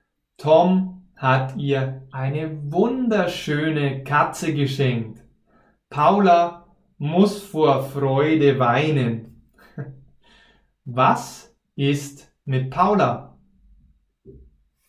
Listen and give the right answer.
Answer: Sie muss vor Freude weinen.